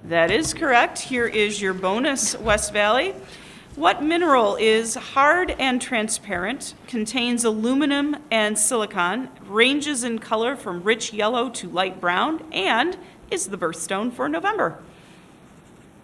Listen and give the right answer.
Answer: It's topaz.